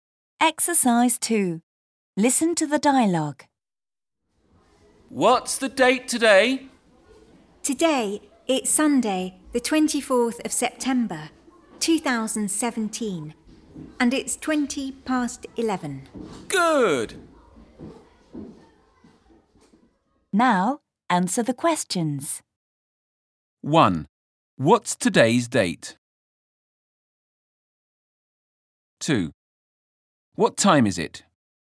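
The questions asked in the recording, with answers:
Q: What's today's date?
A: Sunday, the 24th of September, 2017

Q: What time is it?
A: 20 past 11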